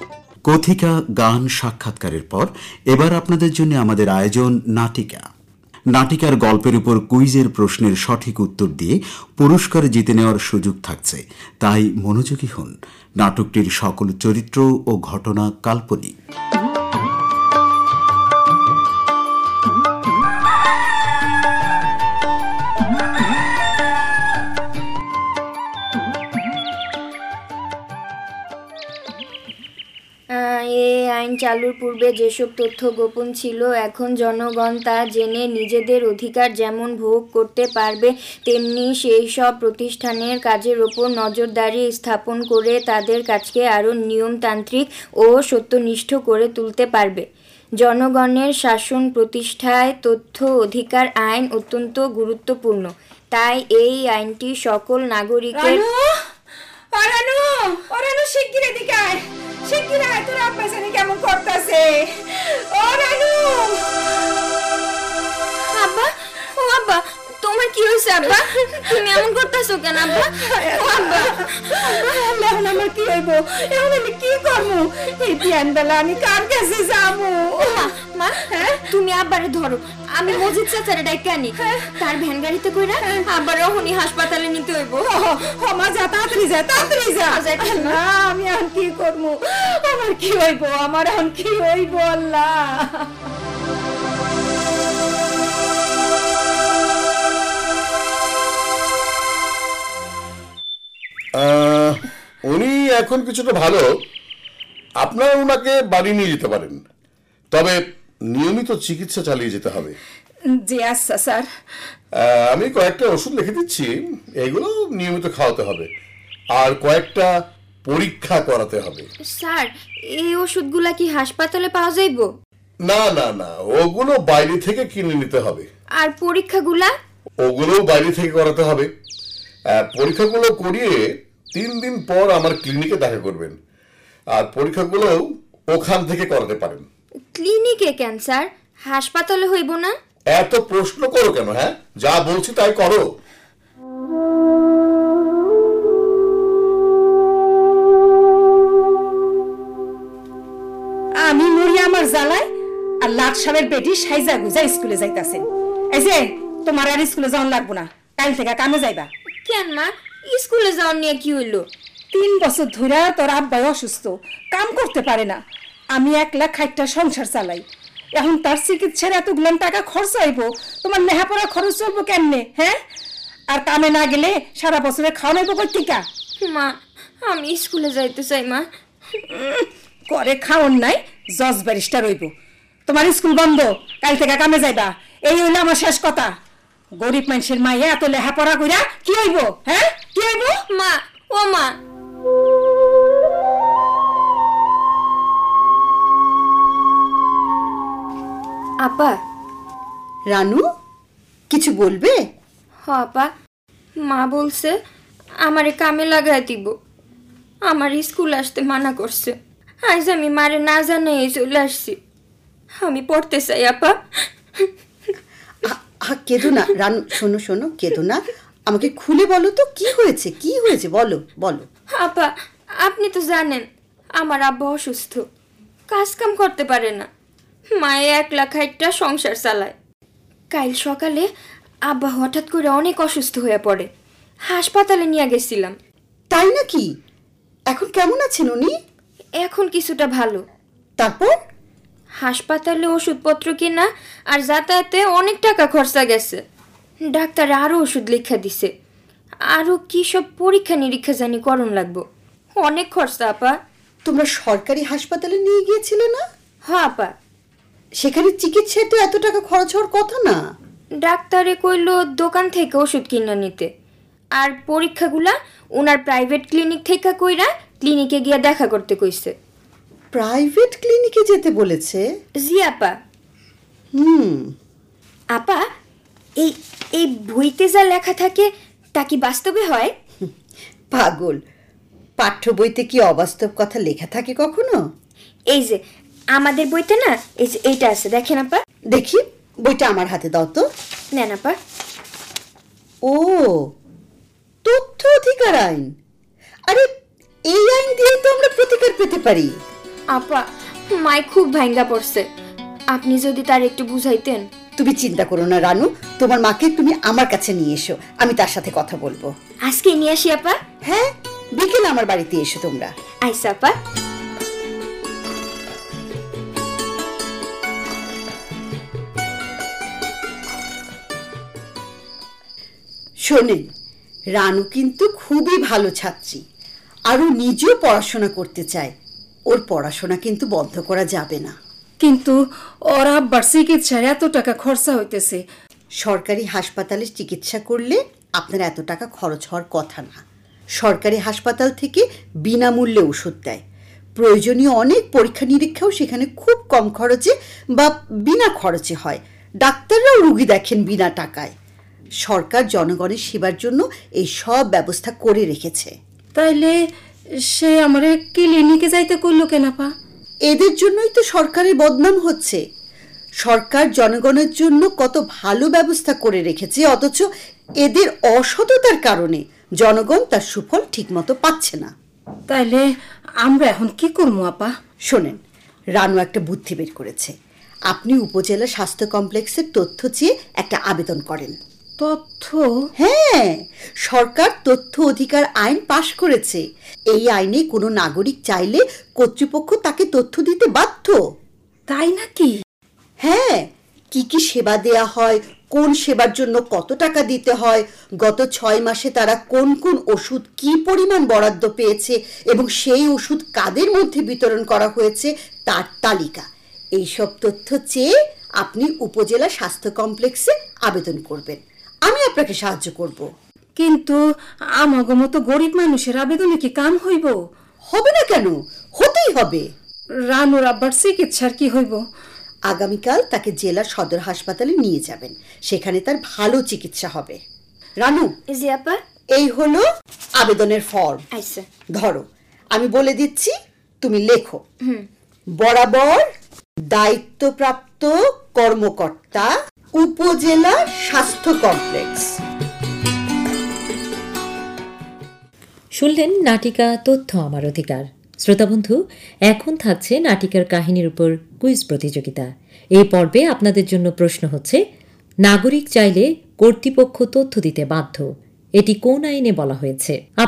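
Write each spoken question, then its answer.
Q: নাগরিক চাইলে কর্তৃপক্ষ তথ্য দিতে বাধ্য, এটি কোন আইনে বলা হয়েছে?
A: তথ্য অধিকার আইন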